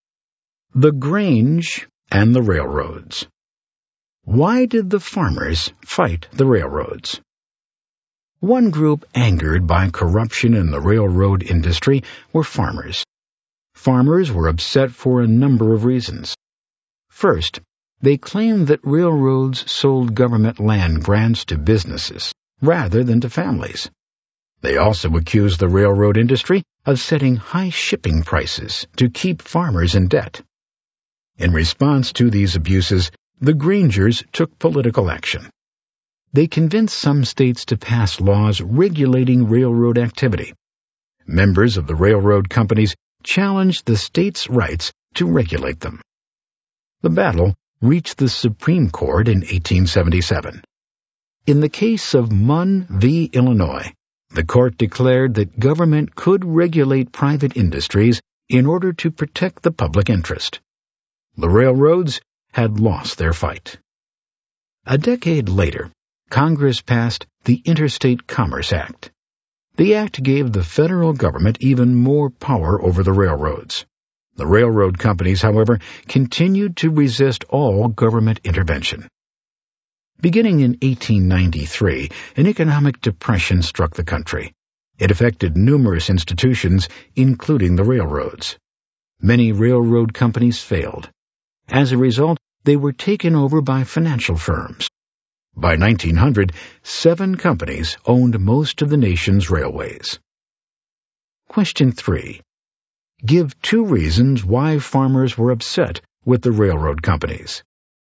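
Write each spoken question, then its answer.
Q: Give two reasons why farmers were upset with the railroad companies.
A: Railroads sold government land grants to businesses rather than families, and set high shipping prices to keep farmers in debt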